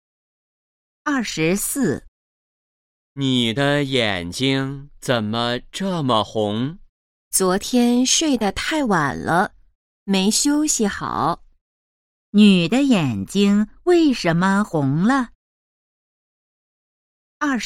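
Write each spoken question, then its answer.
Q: 女的眼睛为什么红了?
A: 昨天睡得太晚了,没休息好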